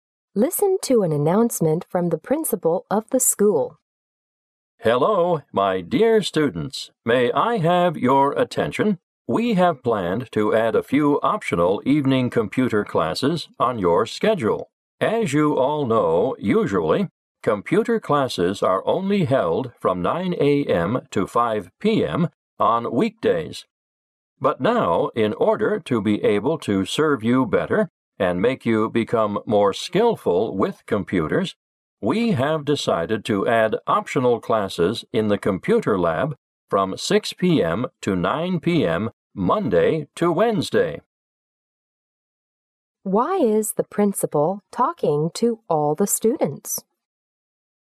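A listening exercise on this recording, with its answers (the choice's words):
Why is the principal talking to all the students?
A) To advise the students to prepare for a computer science contest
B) To ask the students to take as many classes as possible every day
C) To recommend the students to more classes on weekends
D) To encourage the students to enroll in some computer classes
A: To encourage the students to enroll in some computer classes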